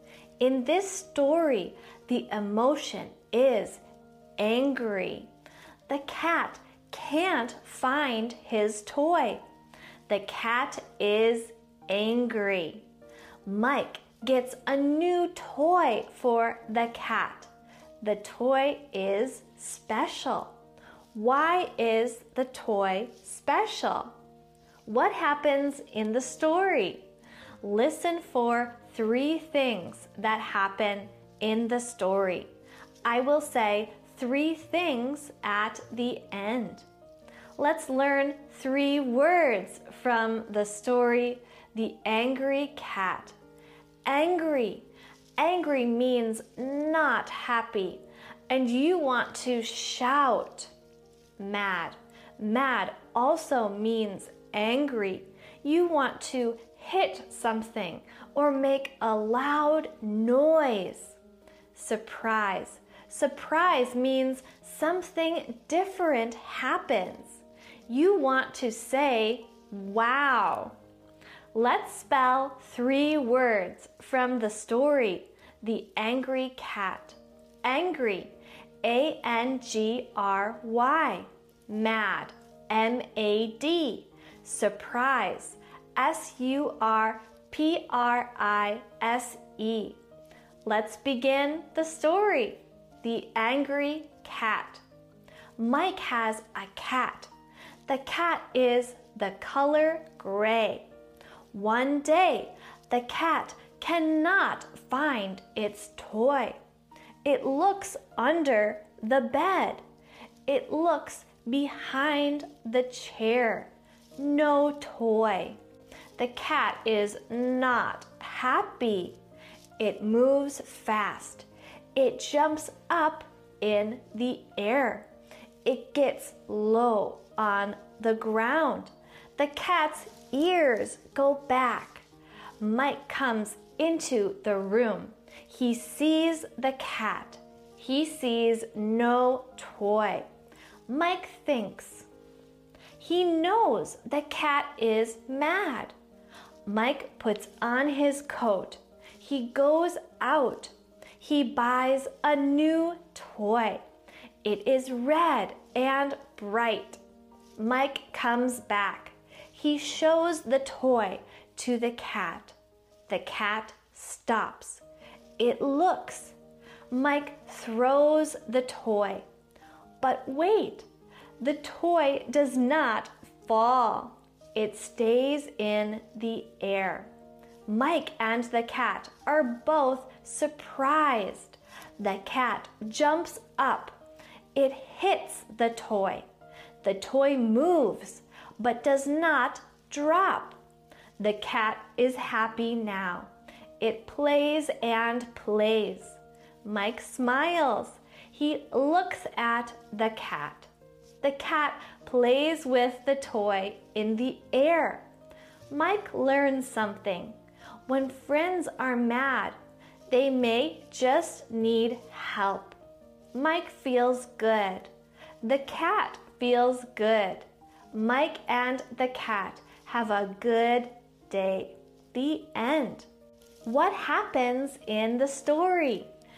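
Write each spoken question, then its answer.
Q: Why is the toy special?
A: It does not fall; it stays in the air.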